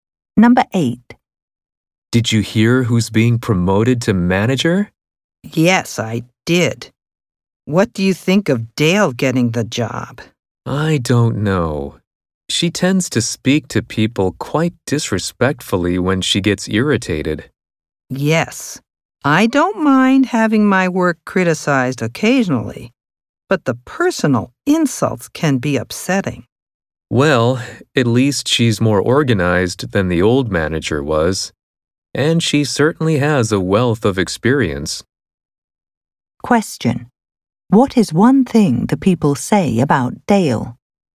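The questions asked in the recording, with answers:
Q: What is one thing the people say about Dale?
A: She speaks to people disrespectfully when irritated (though she is organized and experienced)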